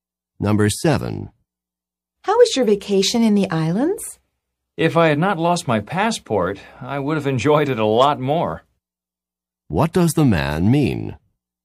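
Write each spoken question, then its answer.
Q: What does the man mean?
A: He lost his passport, so he did not enjoy the vacation very much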